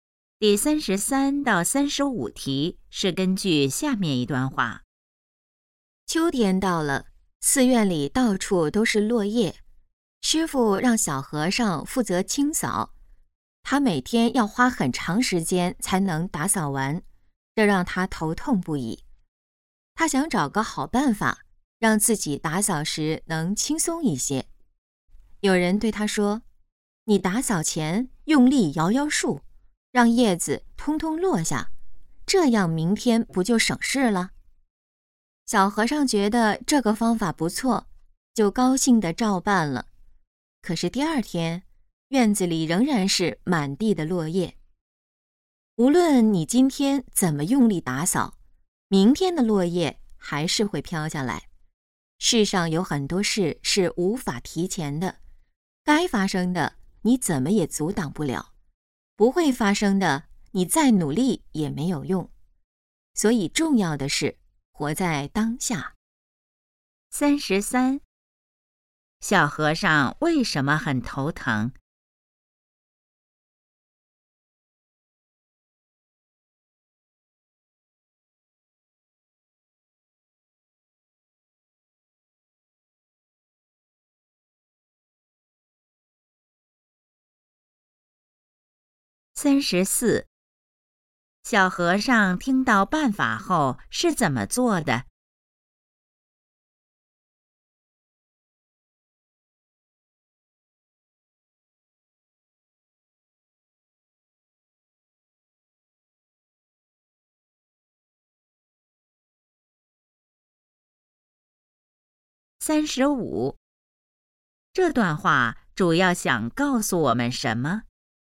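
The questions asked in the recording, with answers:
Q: 小和尚为什么很头疼?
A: 每天扫落叶要花很长时间

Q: 小和尚听到办法后是怎么做的?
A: 用力摇树让叶子落下

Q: 这段话主要想告诉我们什么?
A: 要活在当下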